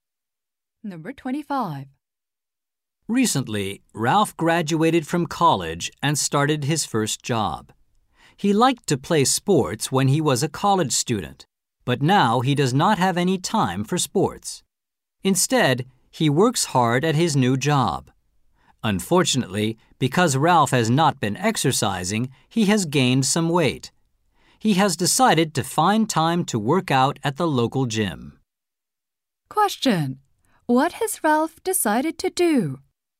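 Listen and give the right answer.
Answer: Work out at the local gym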